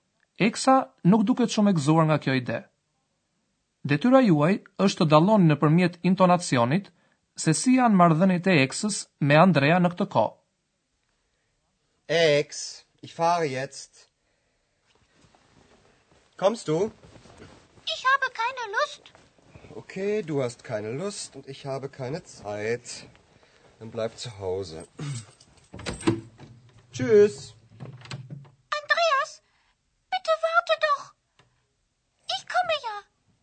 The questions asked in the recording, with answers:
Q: Detyra juaj është të dalloni nëpërmjet intonacionit se si janë marrëdhëniet e Eksës me Andrea në këtë kohë.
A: e vutre se eksa nuk ka dëshirë ta shoqëroj Andrean dhe se Andrea është i nervozuar